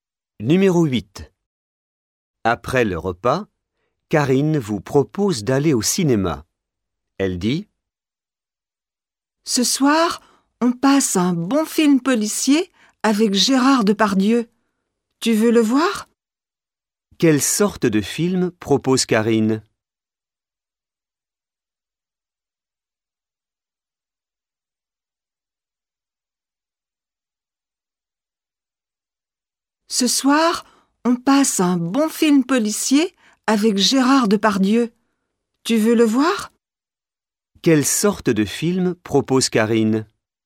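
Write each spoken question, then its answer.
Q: Quelle sorte de film propose Karine?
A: Un film policier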